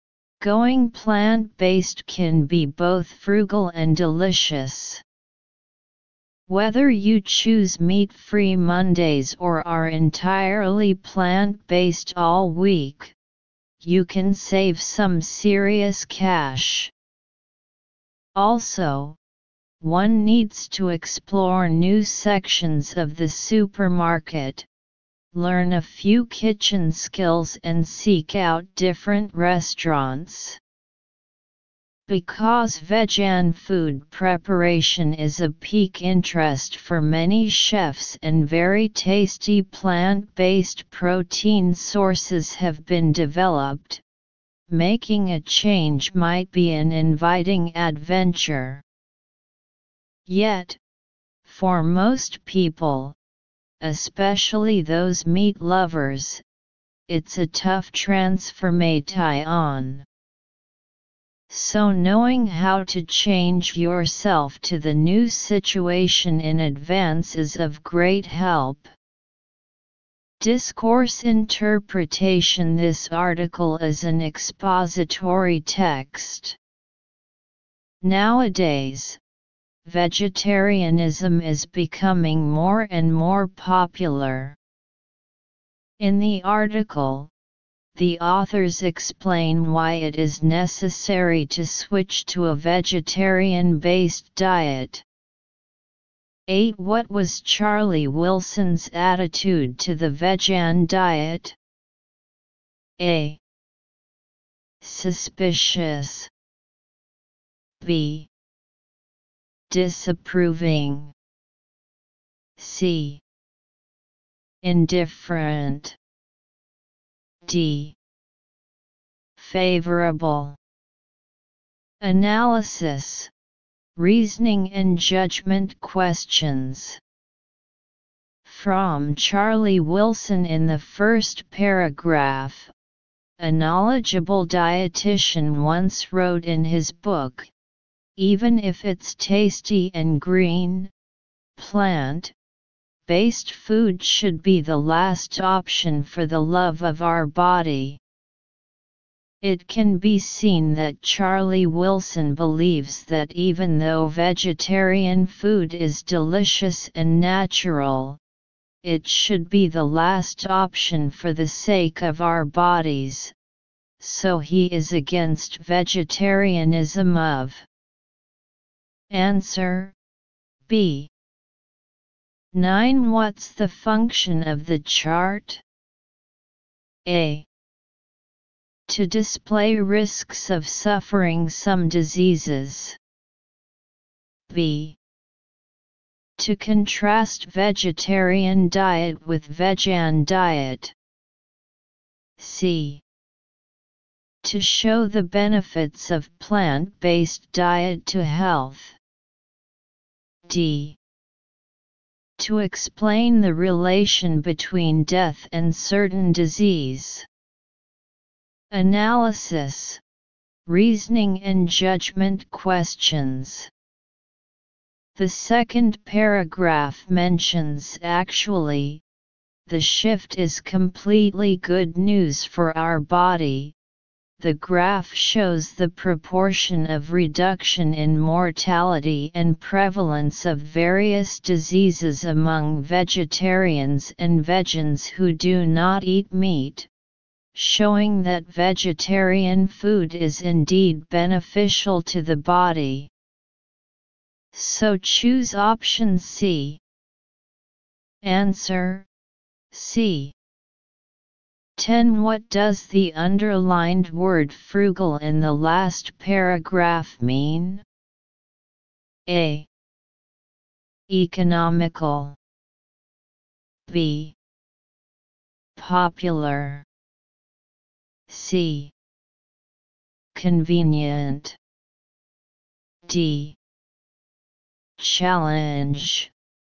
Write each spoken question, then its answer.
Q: What does the underlined word frugal in the last paragraph mean?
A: Answer A.